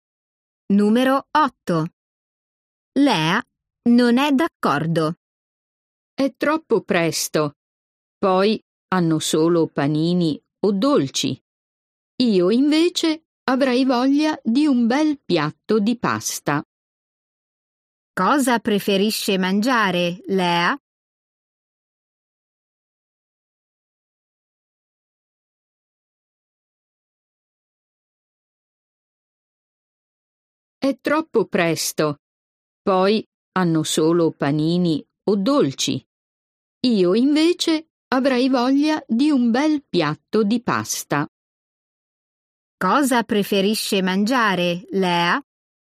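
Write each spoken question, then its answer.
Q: Cosa preferisce mangiare, Lea?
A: un piatto di pasta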